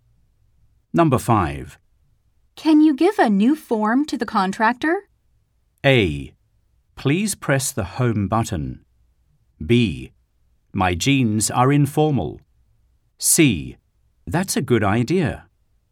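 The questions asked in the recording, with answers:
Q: Can you give a new form to the contractor?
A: C: That's a good idea.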